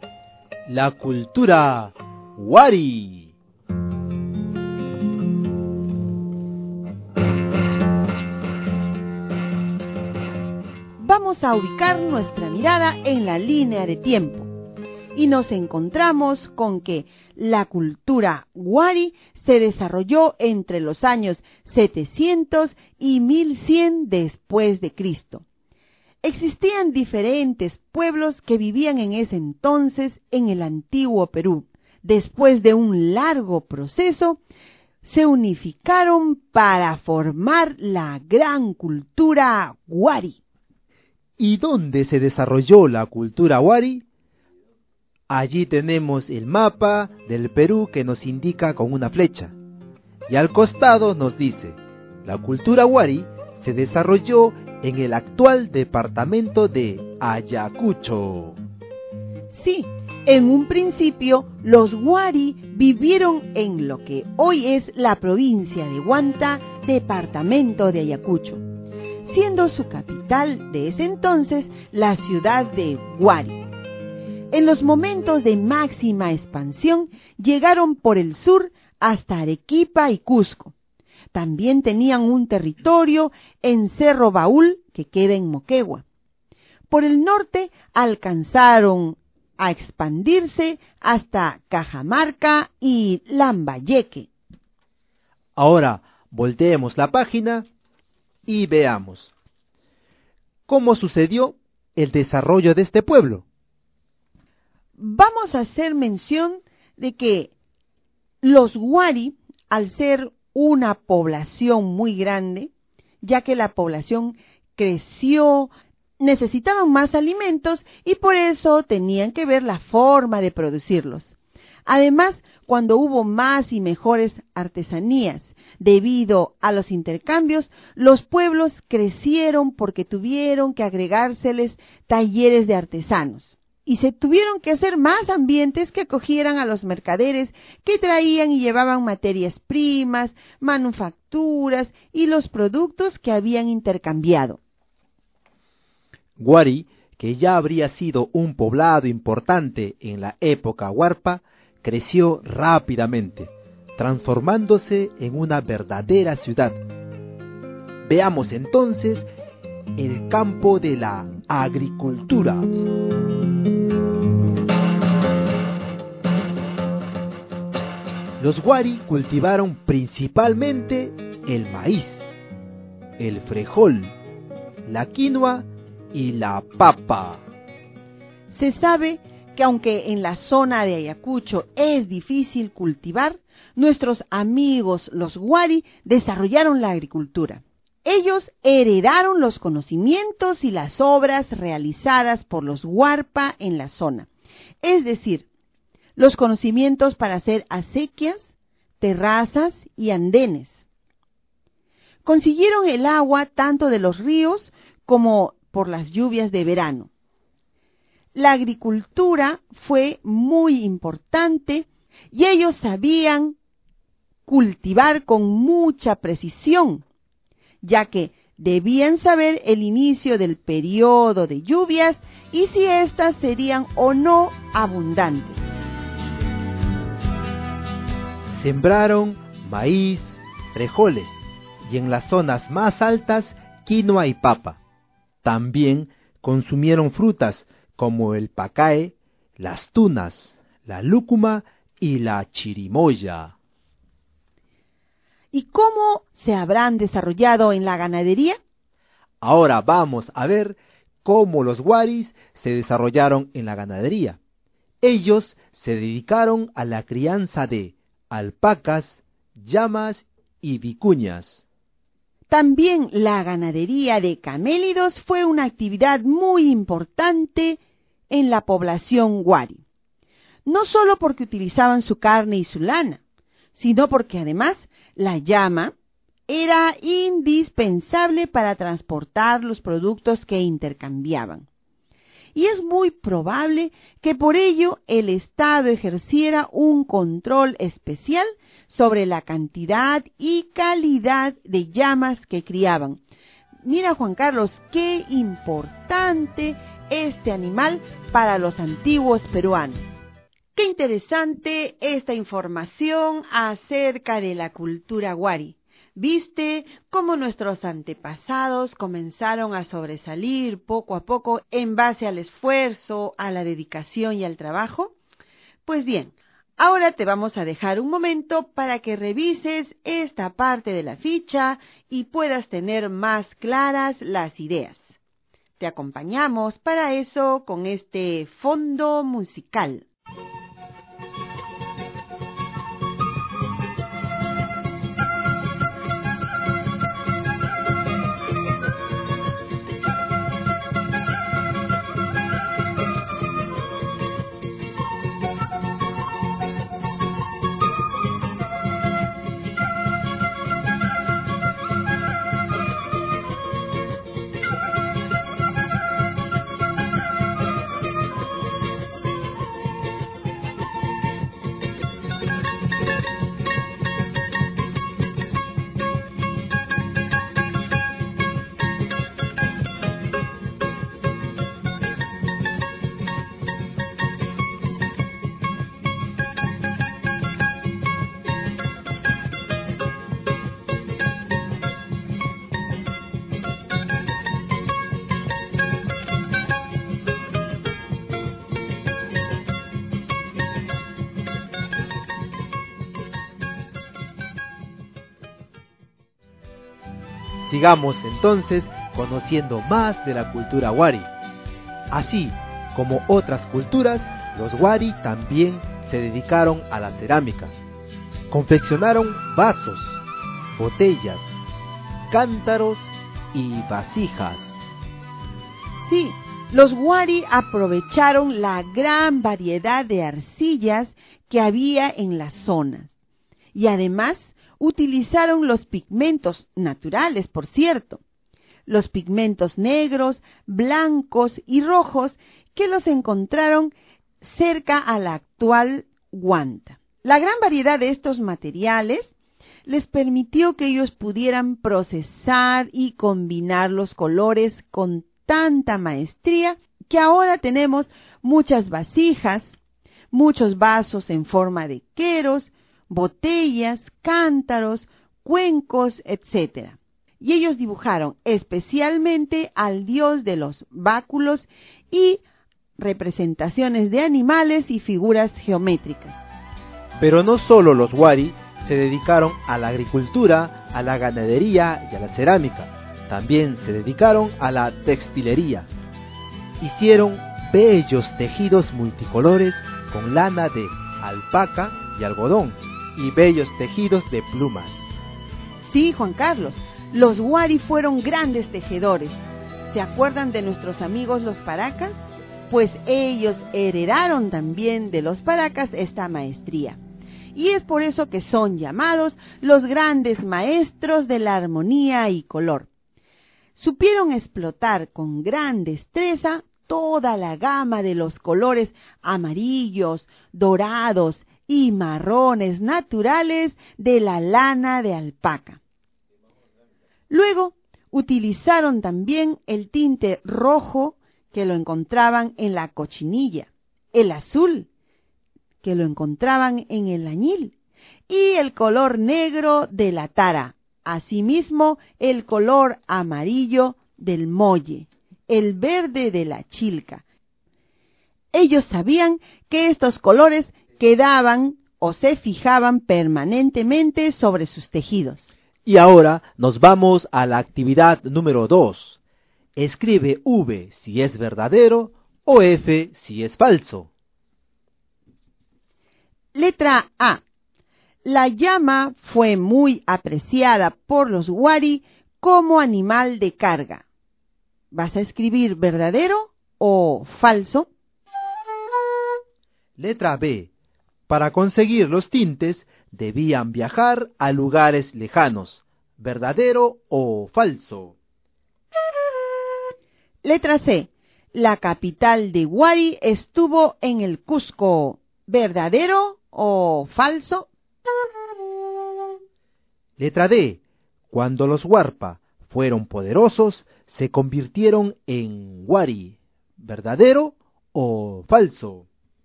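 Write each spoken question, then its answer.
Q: La llama fue muy apreciada por los Wari como animal de carga.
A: Verdadero

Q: La capital de Wari estuvo en el Cusco.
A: Falso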